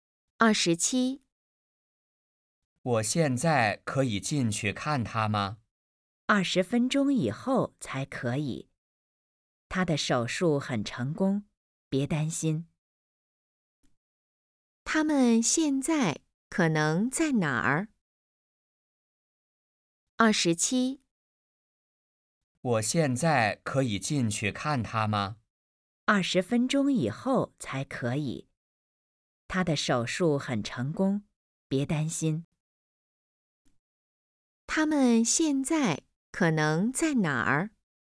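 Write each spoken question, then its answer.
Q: 他们现在可能在哪儿?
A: 医院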